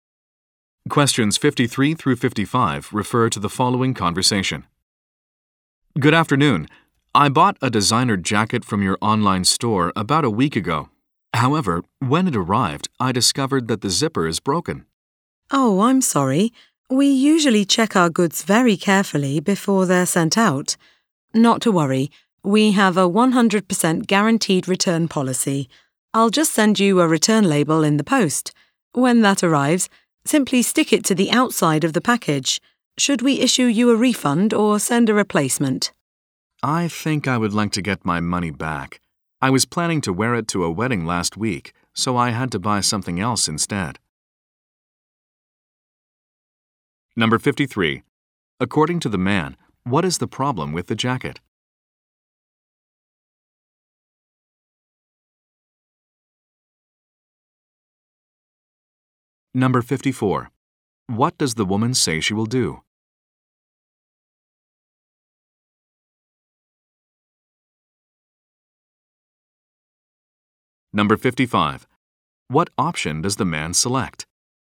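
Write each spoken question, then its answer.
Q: According to the man, what is the problem with the jacket?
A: The zipper is broken

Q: What does the woman say she will do?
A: Send a return label

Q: What option does the man select?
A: A refund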